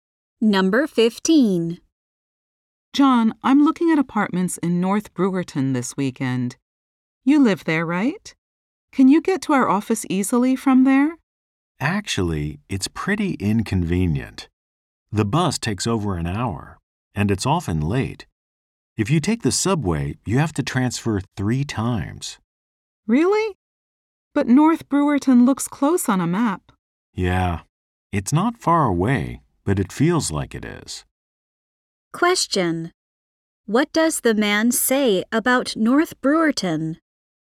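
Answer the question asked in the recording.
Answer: It is inconvenient to get to the office from there.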